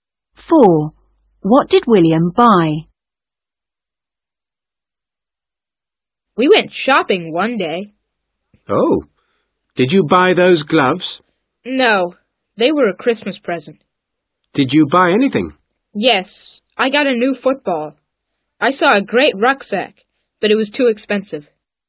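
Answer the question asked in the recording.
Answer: A new football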